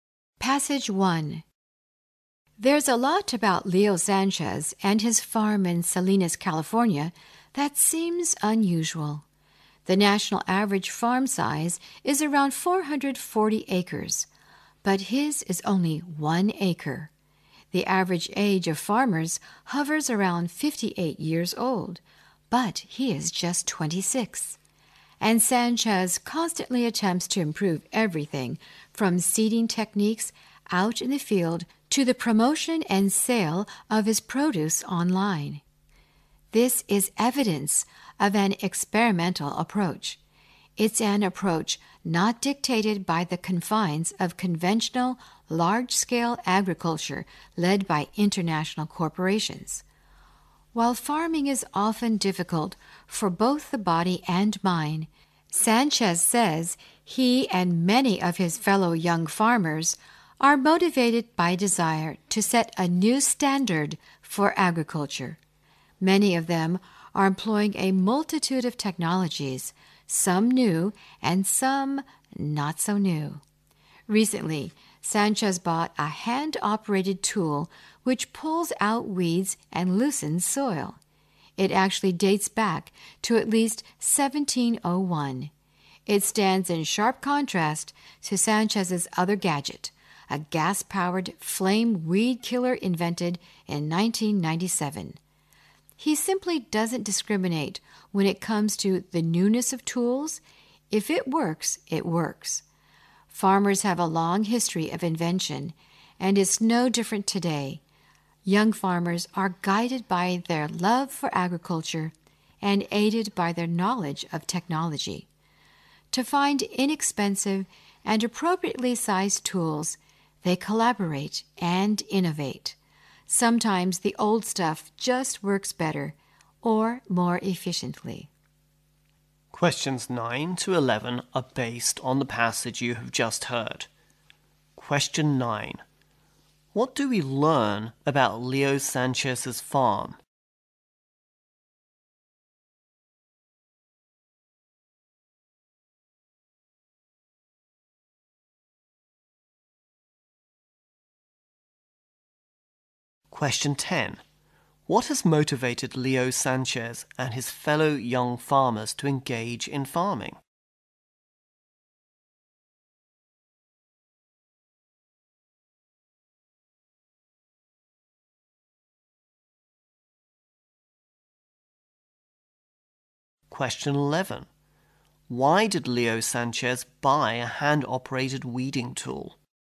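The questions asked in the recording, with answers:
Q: What do we learn about Leo Sanchez's farm?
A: It is only one acre.

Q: What has motivated Leo Sanchez and his fellow young farmers to engage in farming?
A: The desire to set a new standard for agriculture.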